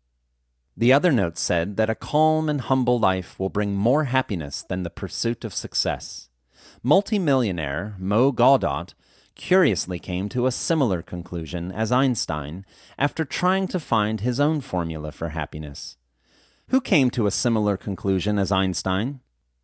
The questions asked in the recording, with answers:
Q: Who came to a similar conclusion as Einstein?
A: Multimillionaire Mo Gawdot came to a similar conclusion as Einstein.